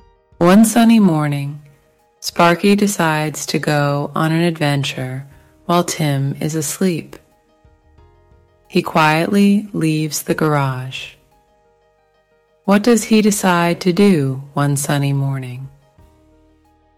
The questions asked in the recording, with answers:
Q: What does he decide to do one sunny morning?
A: He decides to go on an adventure.